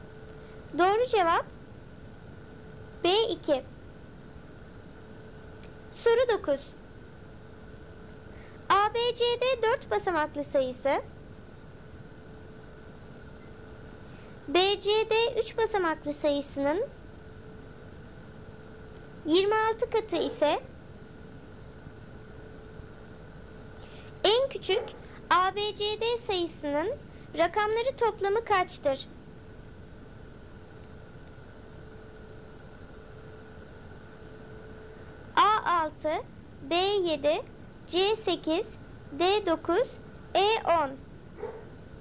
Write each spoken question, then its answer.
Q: en küçük ABCD sayısının rakamları toplamı kaçtır?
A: Doğru cevap A6.